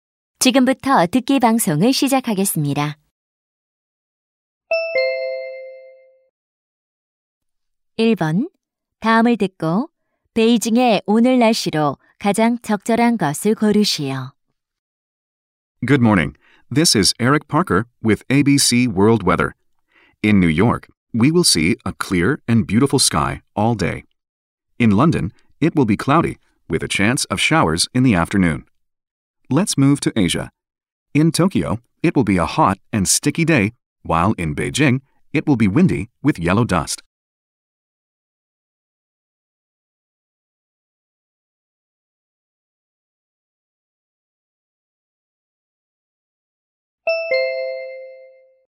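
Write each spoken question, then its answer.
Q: 다음을 듣고 베이징의 오늘 날씨로 가장 적절한 것을 고르시오.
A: 바람이 불고 황사가 있음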